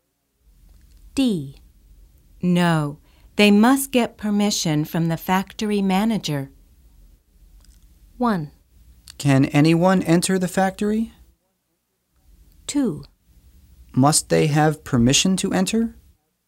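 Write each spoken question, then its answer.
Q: No, they must get permission from the factory manager.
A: 1: Can anyone enter the factory?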